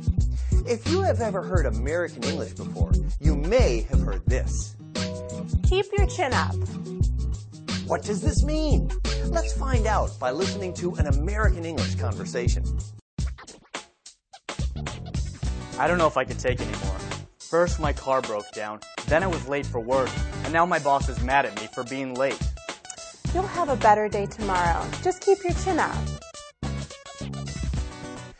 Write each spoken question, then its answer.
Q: What does this mean?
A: Keep your chin up means to keep your spirits high and remain cheerful in a difficult situation.